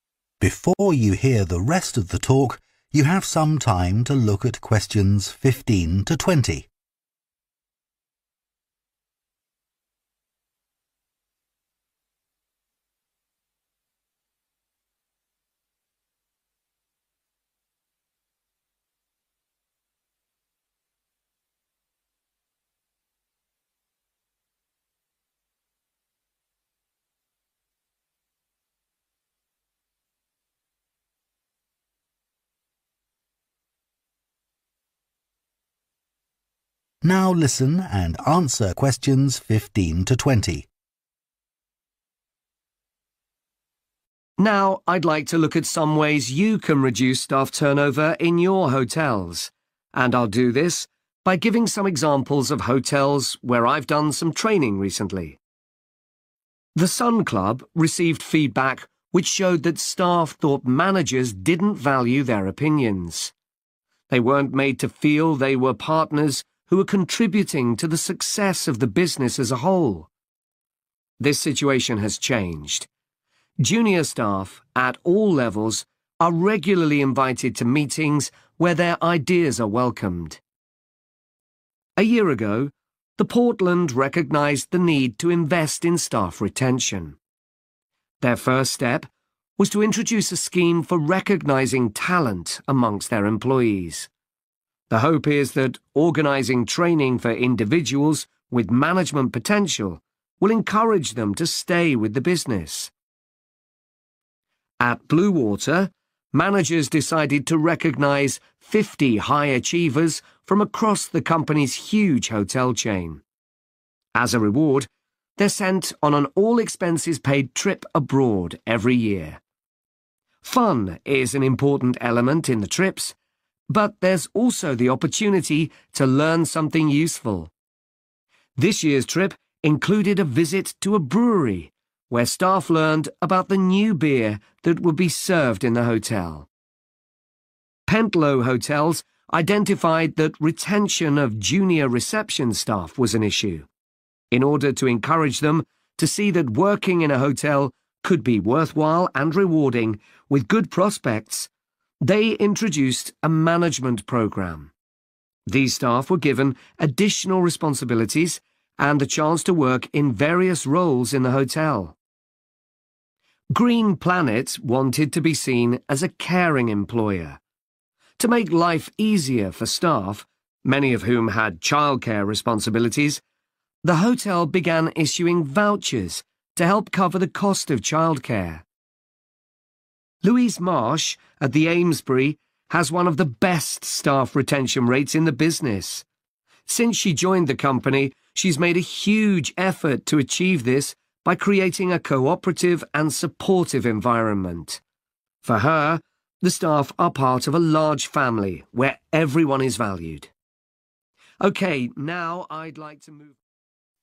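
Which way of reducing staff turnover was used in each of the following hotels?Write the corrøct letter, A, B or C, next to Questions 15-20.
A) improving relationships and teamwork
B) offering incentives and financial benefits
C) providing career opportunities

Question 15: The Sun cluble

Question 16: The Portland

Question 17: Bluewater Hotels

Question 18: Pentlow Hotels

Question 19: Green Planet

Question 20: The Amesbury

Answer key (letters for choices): 15A, 16C, 17B, 18C, 19B, 20A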